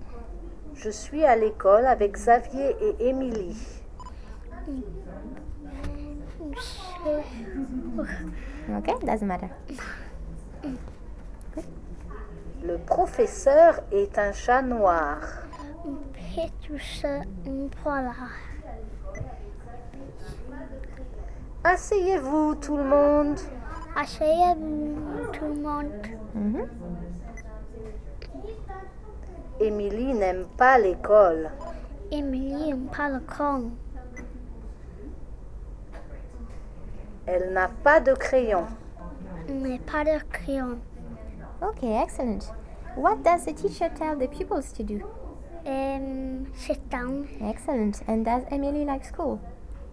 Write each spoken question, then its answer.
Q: And does Emily like school?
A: No? No, she doesn't.